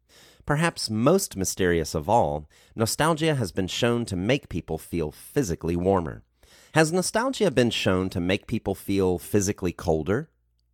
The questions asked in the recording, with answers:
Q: Has nostalgia been shown to make people feel physically colder?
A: No, nostalgia has not been shown to make people feel physically colder.